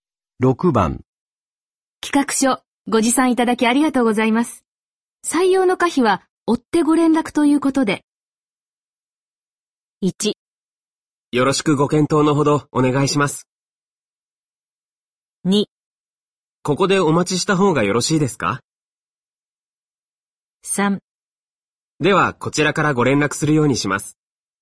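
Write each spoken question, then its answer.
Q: 企画書、ご持参いただきありがとうございます。採用の可否は、追ってご連絡ということで。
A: 1: よろしくご検討のほどお願いします。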